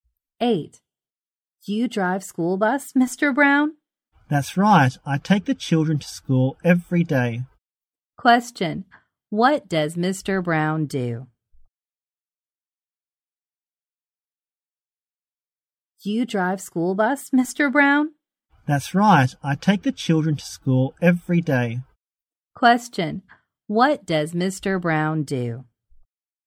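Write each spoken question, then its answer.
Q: Question, what does Mr. Brown do?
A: He drives a school bus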